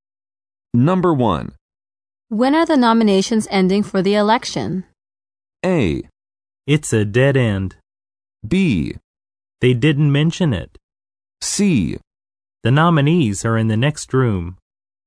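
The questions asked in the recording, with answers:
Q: When are the nominations ending for the election?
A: B: They didn't mention it.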